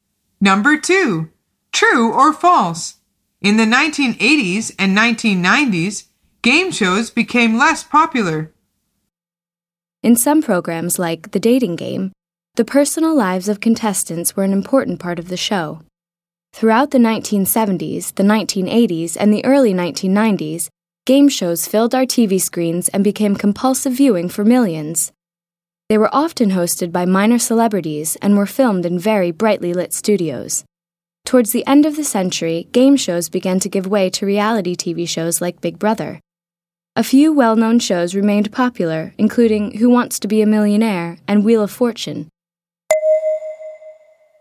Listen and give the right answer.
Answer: The answer is false.